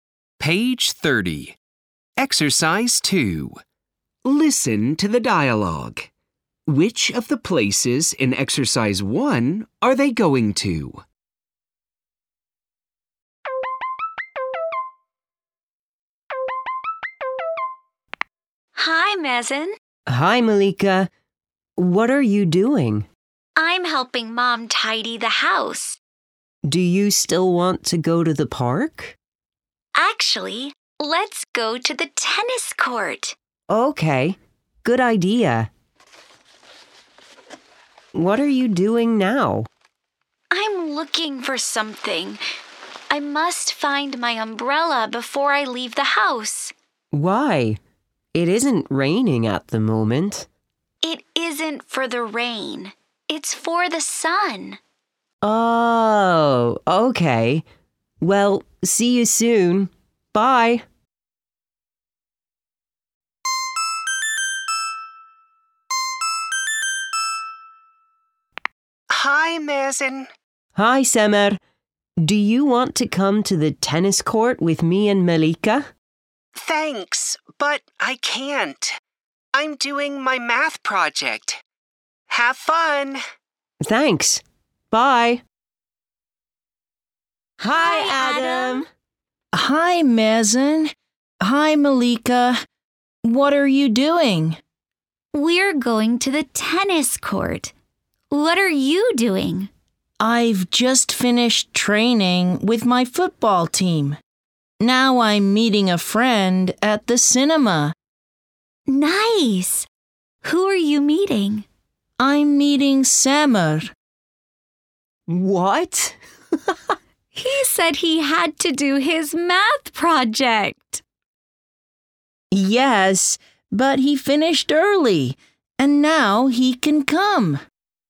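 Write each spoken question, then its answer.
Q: Which of the places in Exercise 1 are they going to?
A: the tennis court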